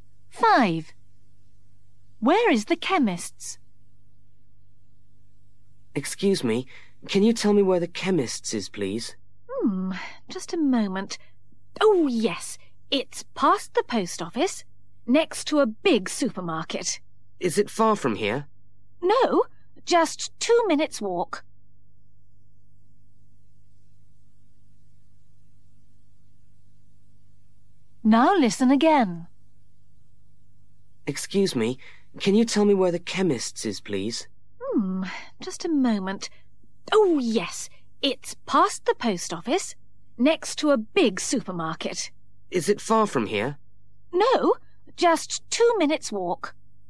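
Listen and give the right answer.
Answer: Past the post office, next to a big supermarket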